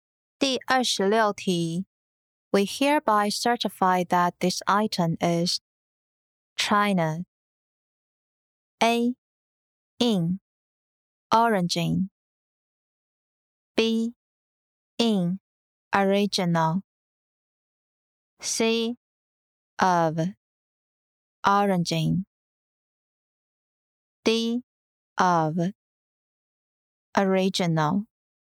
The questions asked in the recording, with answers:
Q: We hereby certify that this item is China.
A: 正确答案为 C. Of Origin